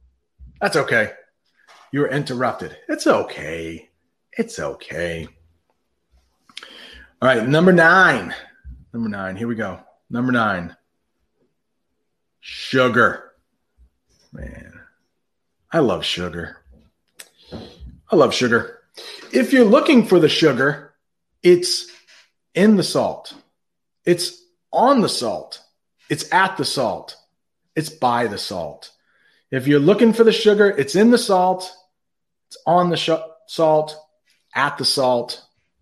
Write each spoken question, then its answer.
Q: If you're looking for the sugar, it's in the salt, it's on the salt, it's at the salt, it's by the salt.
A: the best one by far is by.